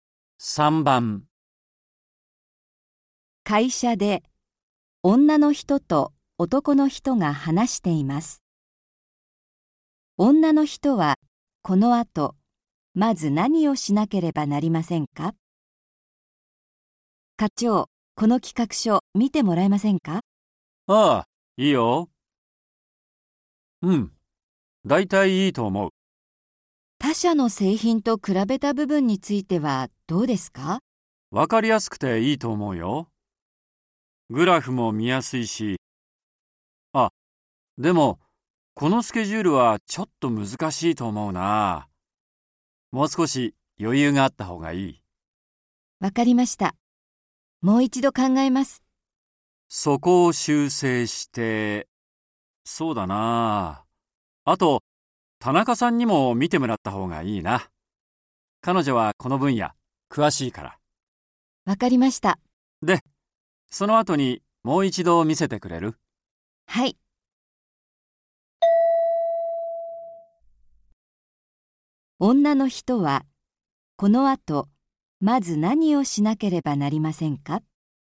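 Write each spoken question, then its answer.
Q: 女の人はこの後まず何をしなければなりませんか。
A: 企画書のスケジュールを修正する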